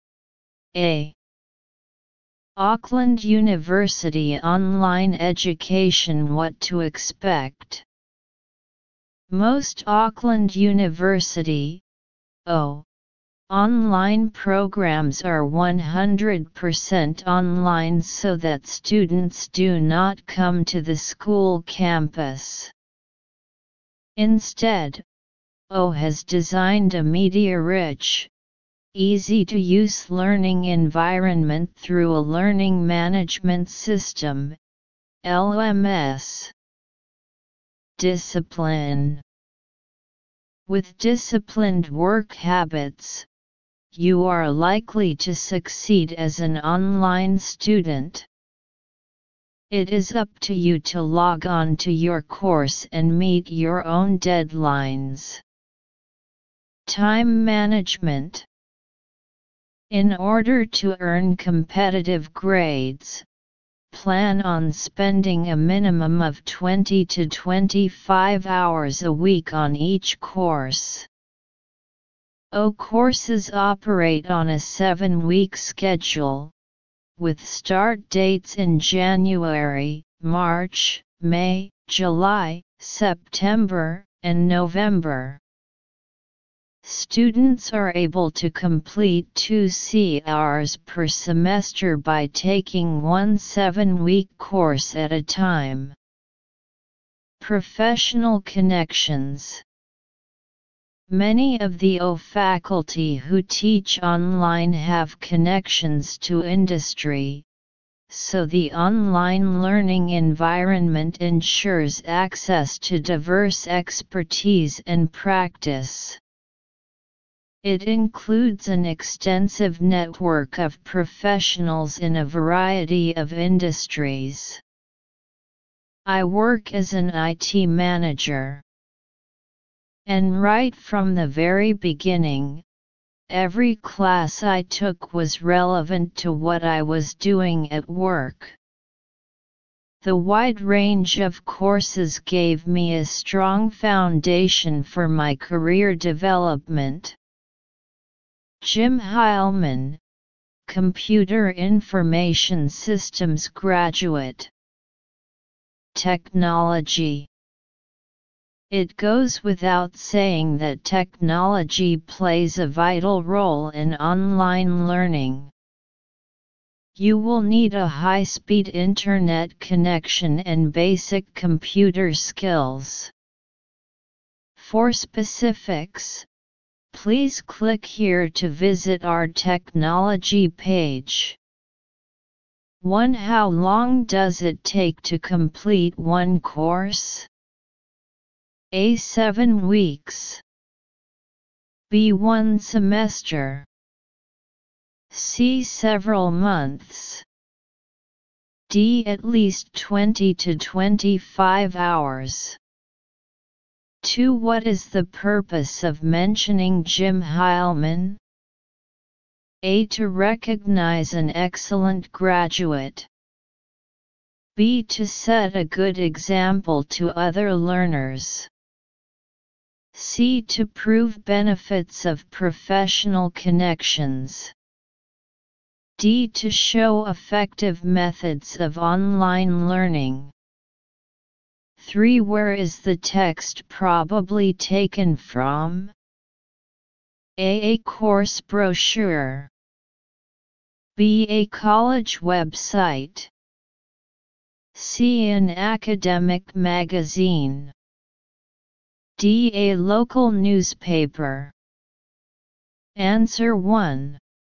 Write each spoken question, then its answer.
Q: What is the purpose of mentioning Jim Heilman?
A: 2. C.

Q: Where is the text probably taken from?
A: 3. B.